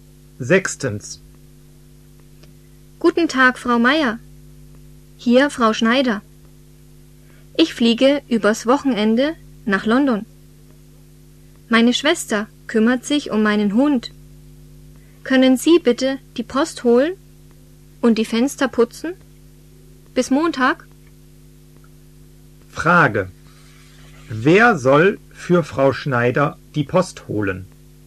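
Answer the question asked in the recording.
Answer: Frau Meier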